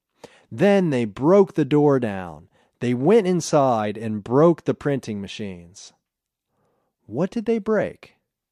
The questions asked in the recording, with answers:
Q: What did they break?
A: They broke the printing machines.